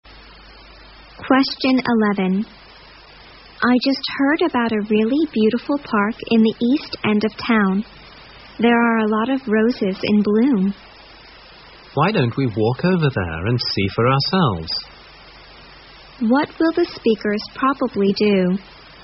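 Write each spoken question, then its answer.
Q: What will the speakers probably do?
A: Walk to the park to see the roses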